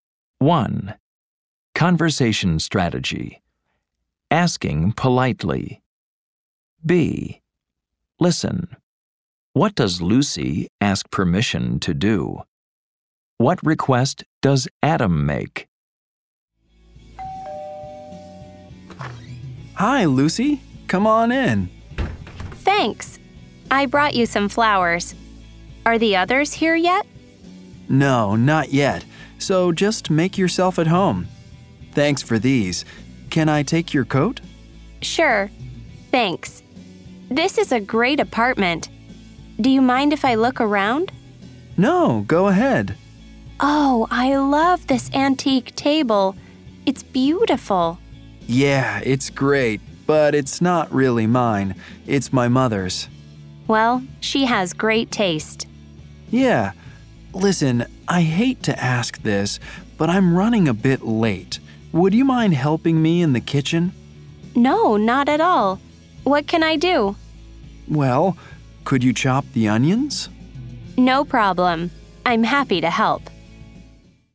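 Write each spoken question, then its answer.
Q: What does Lucy ask permission to do?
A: To look around Adam's apartment

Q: What request does Adam make?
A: He asks her to help him in the kitchen by chopping the onions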